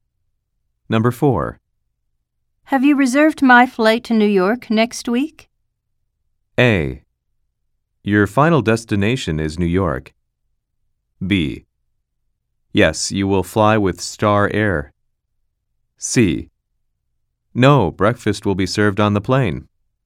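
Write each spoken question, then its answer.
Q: Have you reserved my flight to New York next week?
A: B: Yes, you will fly with Star Air.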